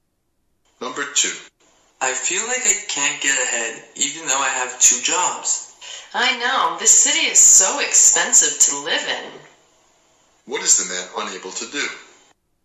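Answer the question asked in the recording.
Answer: Get ahead financially despite having two jobs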